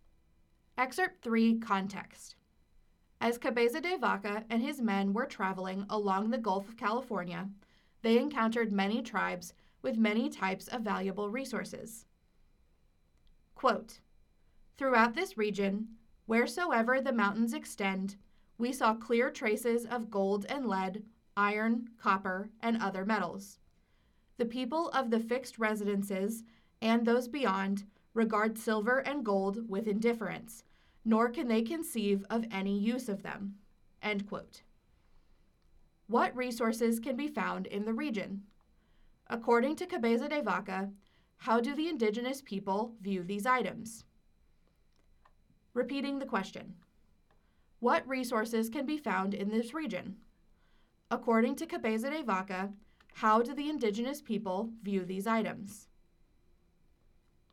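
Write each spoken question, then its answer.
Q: According to Cabeza de Vaca, how do the indigenous people view these items?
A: With indifference; they see no use for them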